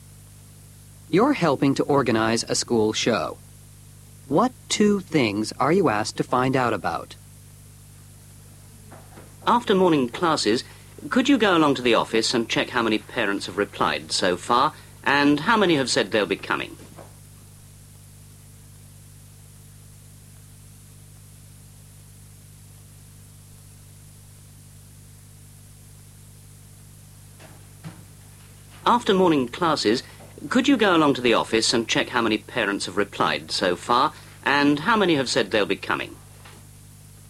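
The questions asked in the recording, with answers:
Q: What two things are you asked to find out about?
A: How many parents have replied so far and how many are coming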